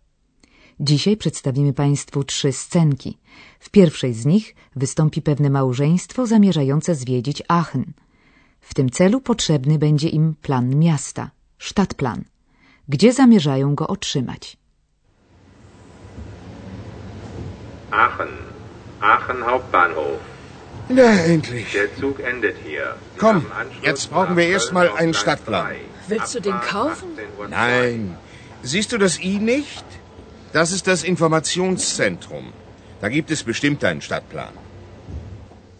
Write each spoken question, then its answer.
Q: Gdzie zamierzają go otrzymać?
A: mężczyzna zamierza zapytać się o plan miasta w punkcie informacyjnym